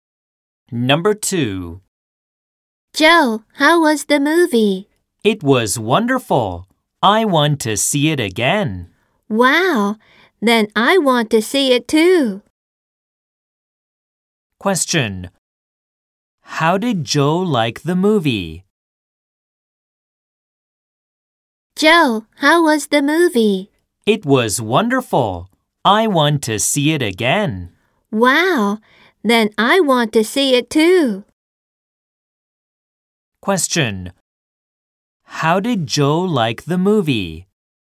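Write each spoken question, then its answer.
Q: How did Joe like the movie?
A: It was wonderful.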